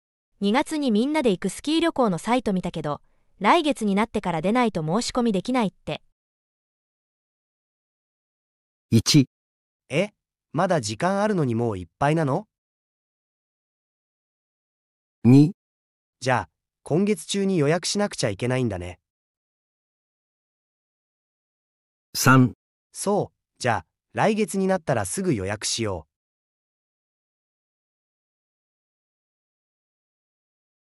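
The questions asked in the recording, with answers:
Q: 2月にみんなで行くスキー旅行のサイト見たけど、来月になってから出ないと申し込みできないって。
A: 3: そう、じゃあ来月になったらすぐ予約しよう。

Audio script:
女:2月にみんなで行くスキー旅行のサイト見たけど、来月になってからでないと申し込みできないって。
1.え? まだ時間あるのにもういつばいなの?
2.じゃ、今月中に予約しなくちゃいけないんだね
3.そう? じゃ、来月になったらすぐ予約しよう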